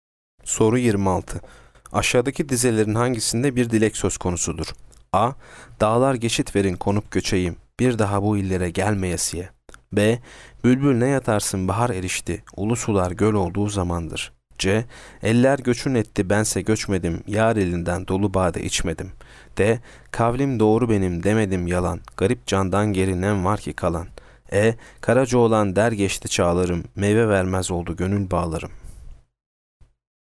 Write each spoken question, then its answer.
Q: Aşağıdaki dizelerin hangisinde bir dilek söz konusudur?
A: Yanıt A. Dağlar geçit verin konup göçeyim.